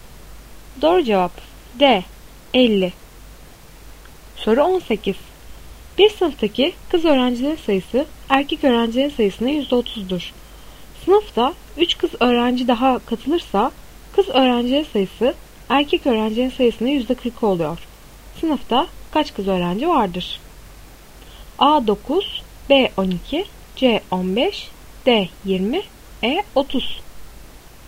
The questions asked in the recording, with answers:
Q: Sınıfta kaç kız öğrenci vardır?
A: Doğru cevap A 9.